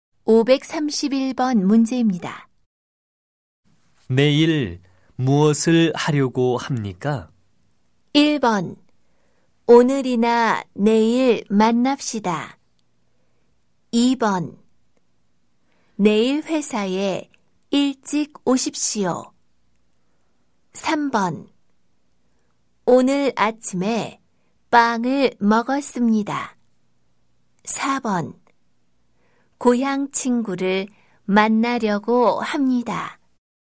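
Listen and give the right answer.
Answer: 4번: 고향 친구를 만나려고 합니다.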